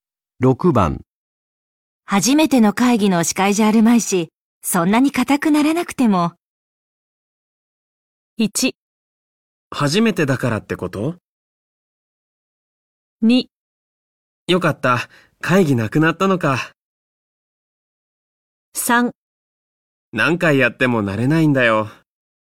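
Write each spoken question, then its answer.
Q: 6番初めての会議の司会じゃあるまいし、そんなに硬くならなくても。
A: 3: 何回やっても慣れないんだよ。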